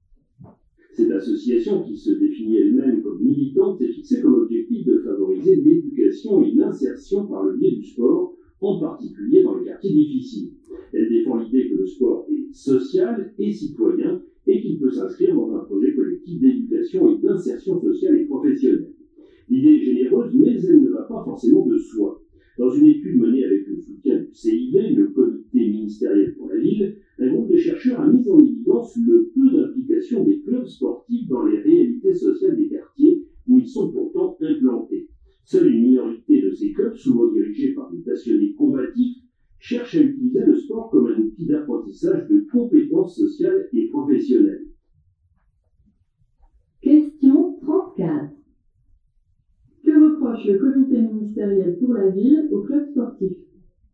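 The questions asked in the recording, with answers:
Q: Que reproche le comité ministériel pour la ville aux clubs sportifs ?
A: Ils s'impliquent peu dans les réalités sociales des quartiers où ils sont implantés.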